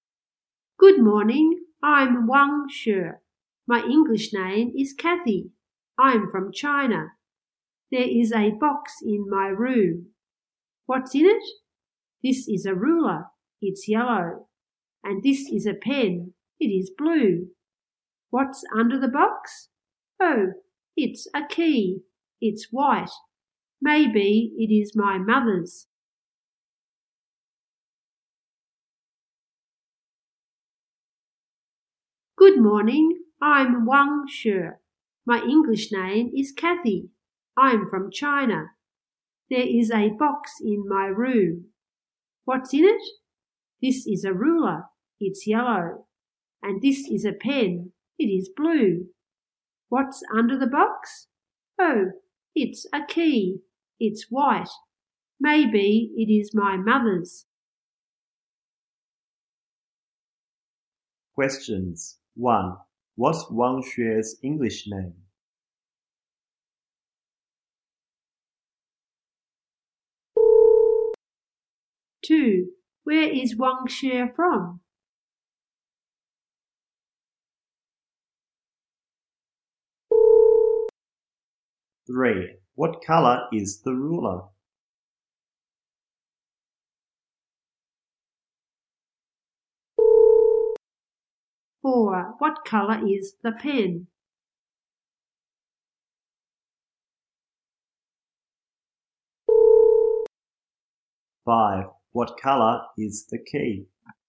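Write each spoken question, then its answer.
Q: What's Wang Xue's English name?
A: Kathy

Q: Where is Wang Xue from?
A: China

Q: What color is the ruler?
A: Yellow

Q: What color is the pen?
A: Blue

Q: What color is the key?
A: White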